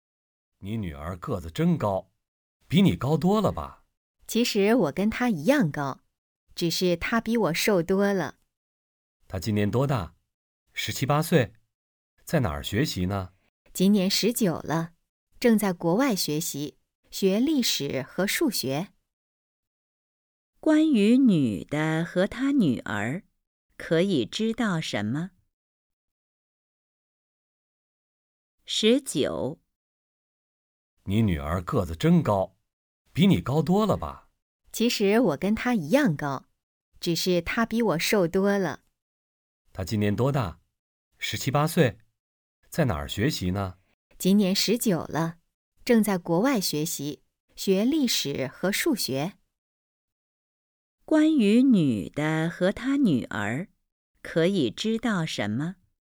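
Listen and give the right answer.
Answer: 她们一样高,女儿19岁,在国外学习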